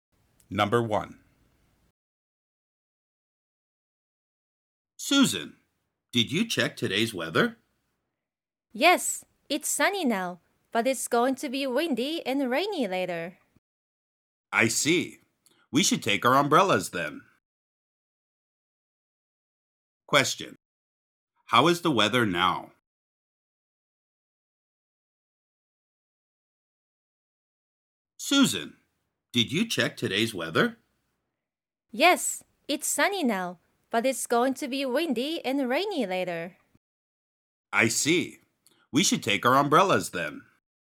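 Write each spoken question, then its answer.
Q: How is the weather now?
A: It's sunny.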